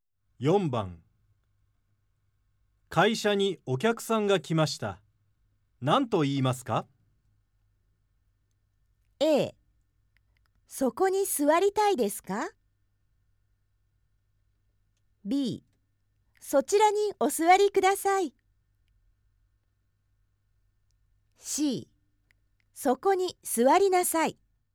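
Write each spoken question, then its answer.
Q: 会社にお客さんが来ました。何と言いますか?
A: B: そちらにお座りください。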